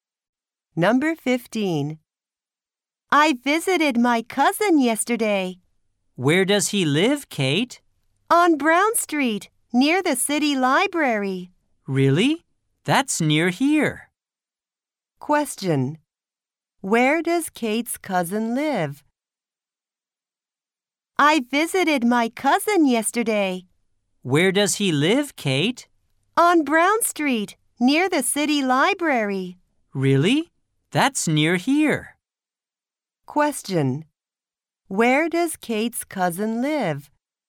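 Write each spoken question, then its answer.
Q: Where does Kate's cousin live?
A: On Brown Street, near the city library.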